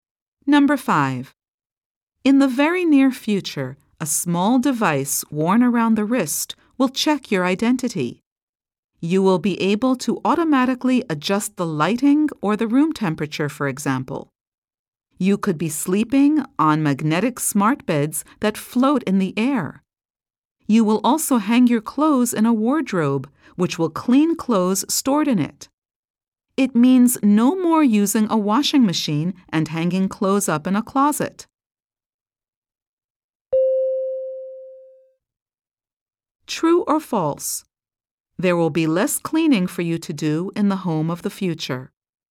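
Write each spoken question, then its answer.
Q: True or false? There will be less cleaning for you to do in the home of the future.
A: True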